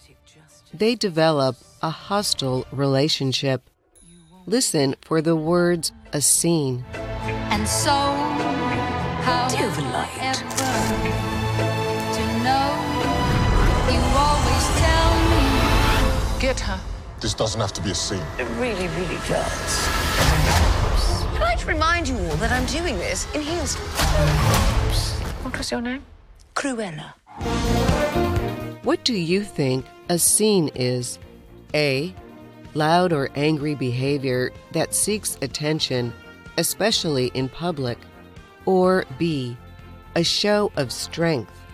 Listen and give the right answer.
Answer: The answer is A. A scene is loud or angry behavior that seeks attention, especially in public.